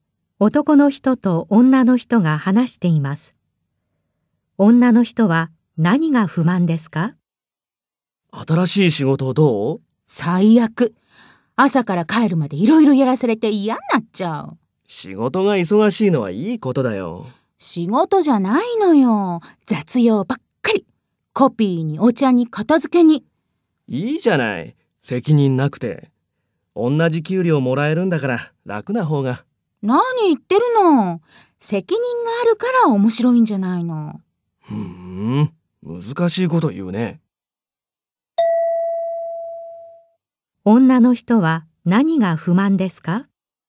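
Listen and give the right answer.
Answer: 責任のある仕事ではなく、コピーやお茶、片付けなどの雑用ばかりさせられること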